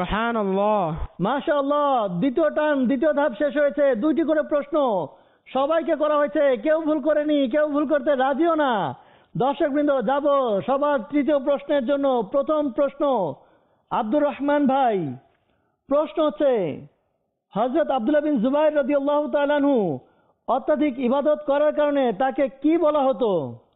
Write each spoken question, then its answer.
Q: হযরত আব্দুল্লাহ বিন জুবাইর রাদিয়াল্লাহু তাআলা আনহু অত্যধিক ইবাদত করার কারণে তাকে কি বলা হতো?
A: হামামাতুল মসজিদ।